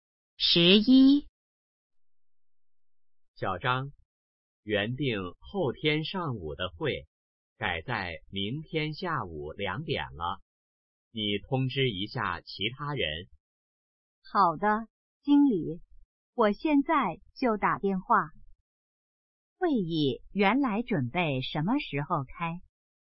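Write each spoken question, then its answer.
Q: 会议原来准备什么时候开?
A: 后天上午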